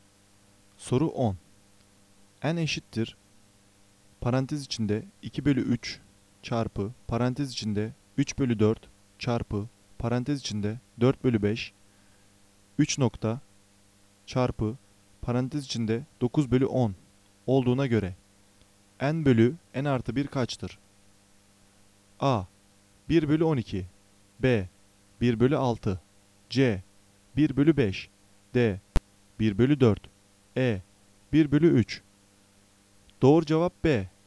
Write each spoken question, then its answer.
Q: N eşittir, parantez içinde 2 bölü 3 çarpı, parantez içinde 3 bölü 4 çarpı, parantez içinde 4 bölü 5, 3 nokta çarpı, parantez içinde 9 bölü 10 olduğuna göre N bölü N artı 1 kaçtır?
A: Doğru cevap B.